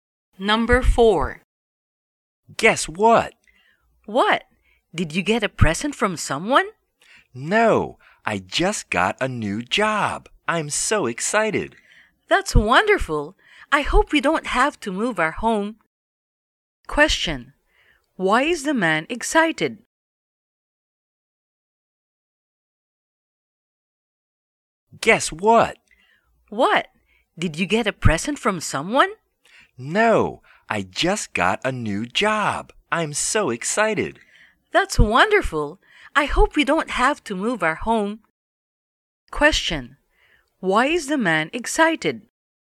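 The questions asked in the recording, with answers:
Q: Why is the man excited?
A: He just got a new job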